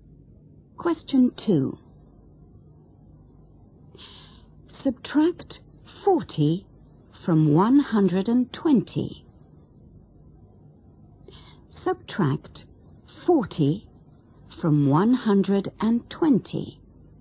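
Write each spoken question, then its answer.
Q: Subtract 40 from 120.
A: 80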